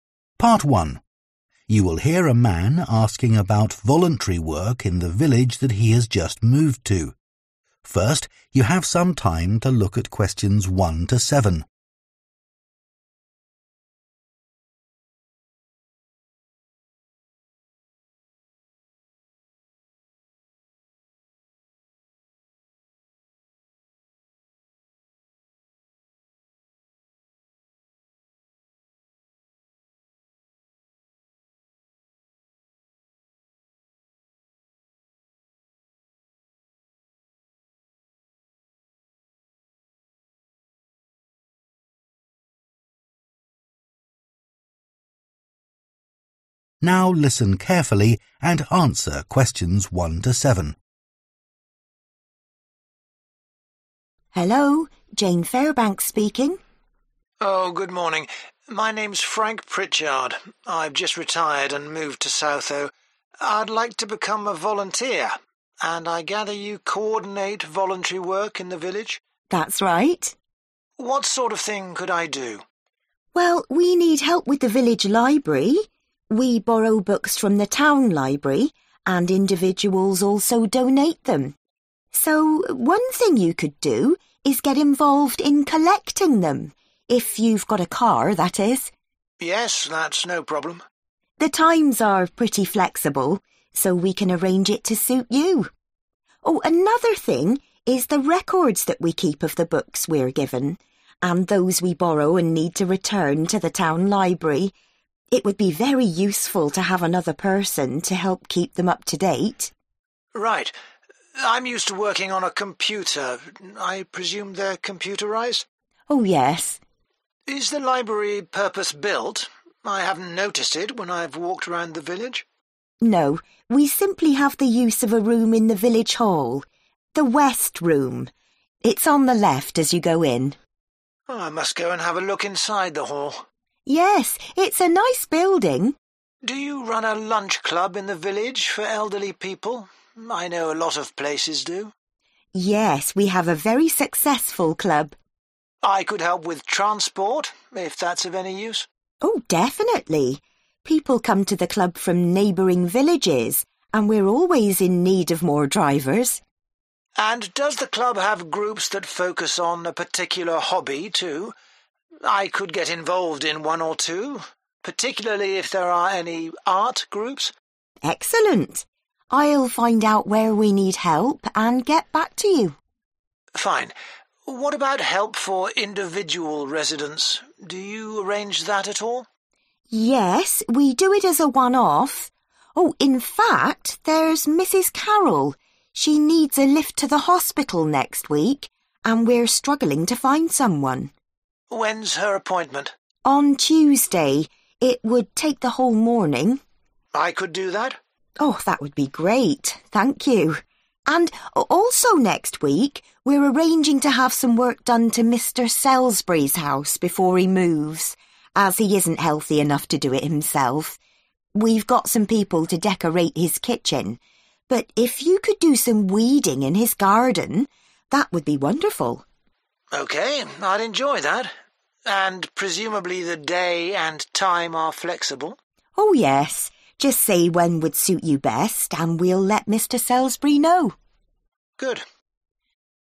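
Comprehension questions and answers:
Complete the notes below. Write ONE WORD ONLY for each answer.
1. Help with 1 ........................ books (times to be arranged)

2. Help needed to keep 2 ........................ of books up to date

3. Library is in the 3 ........................ Room in the village hall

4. Help by providing 4 ........................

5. Help with hobbies such as 5 ........................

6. Taking Mrs Carroll to 6 ........................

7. Work in the 7 ........................ at Mr Selsbury's house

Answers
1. collecting
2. records
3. West
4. transport
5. art
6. hospital
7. garden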